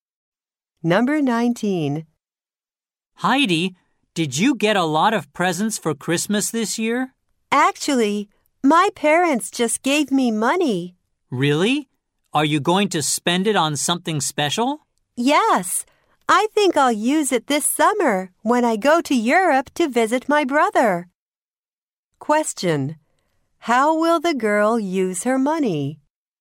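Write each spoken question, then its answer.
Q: How will the girl use her money?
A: On her trip to Europe this summer to visit her brother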